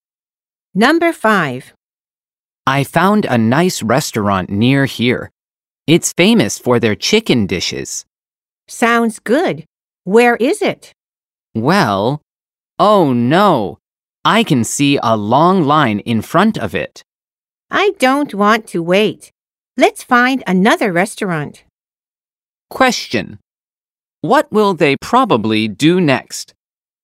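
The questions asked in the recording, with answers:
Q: What will they probably do next?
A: Find another restaurant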